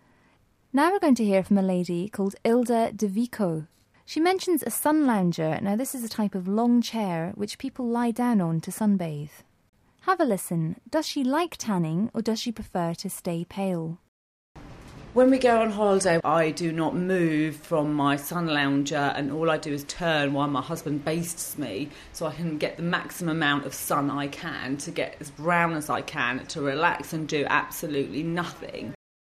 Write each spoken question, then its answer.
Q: Does she like tanning or does she prefer to stay pale?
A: Wow, she sounds like a professional sun worshipper.